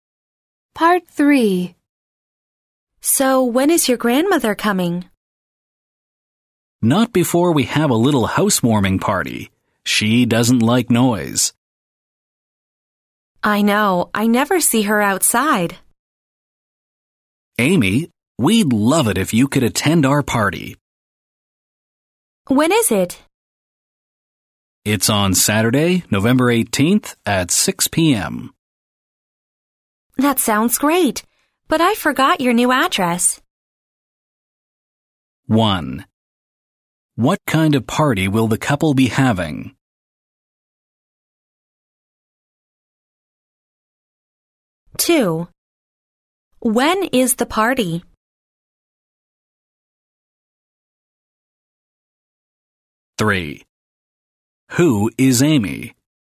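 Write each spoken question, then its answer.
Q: What kind of party will the couple be having?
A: A housewarming party

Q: When is the party?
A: Saturday, November 18th at 6 p.m.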